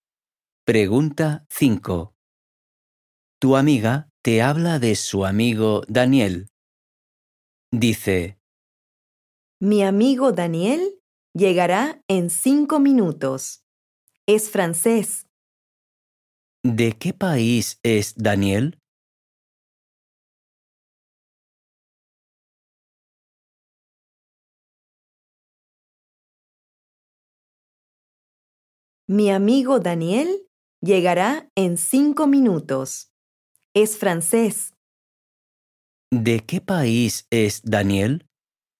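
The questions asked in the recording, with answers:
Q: ¿De qué país es Daniel?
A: Francia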